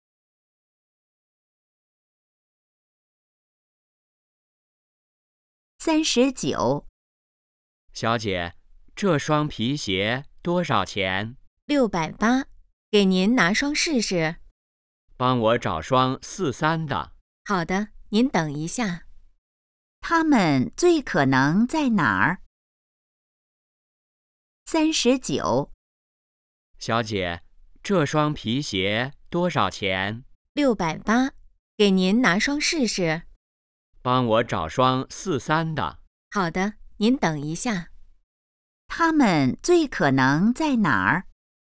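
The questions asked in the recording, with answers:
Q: 他们最可能在哪儿?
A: 鞋店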